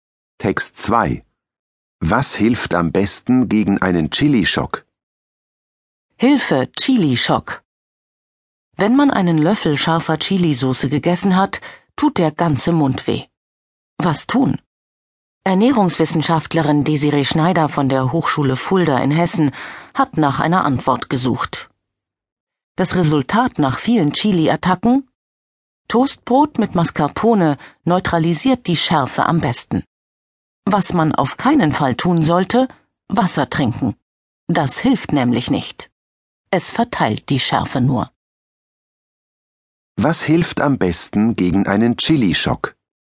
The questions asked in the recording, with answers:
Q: Was hilft am besten gegen einen Chili-Schock?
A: Toastbrot mit Mascarpone.